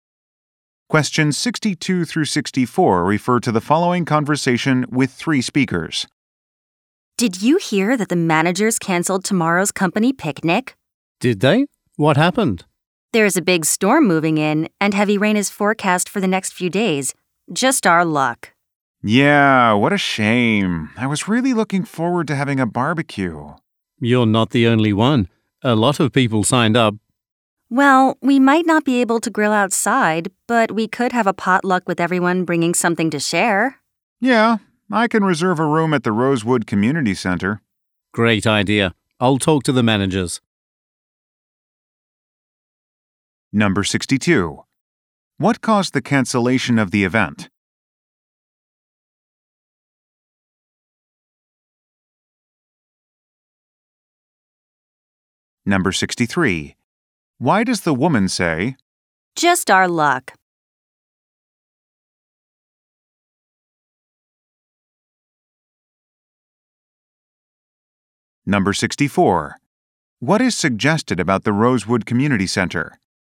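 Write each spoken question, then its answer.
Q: What caused the cancellation of the event?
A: A storm with heavy rain

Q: What is suggested about the Rosewood Community Center?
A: It could host the potluck indoors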